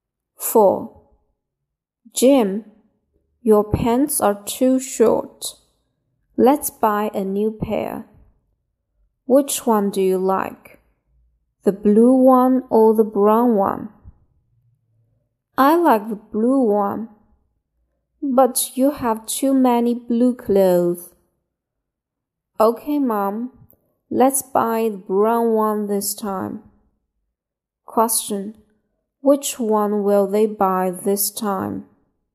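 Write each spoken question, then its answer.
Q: Which one will they buy this time?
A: The brown one.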